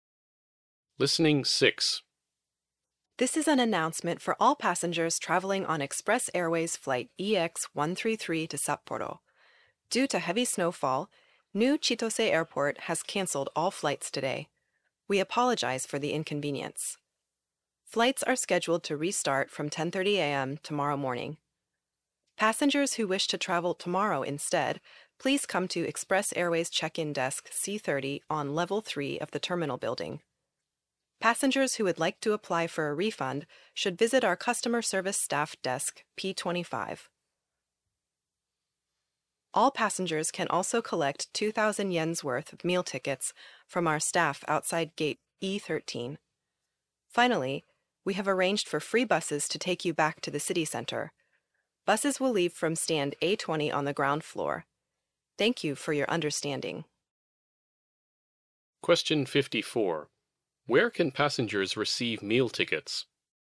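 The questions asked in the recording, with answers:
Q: Where can passengers receive meal tickets?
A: Outside gate E13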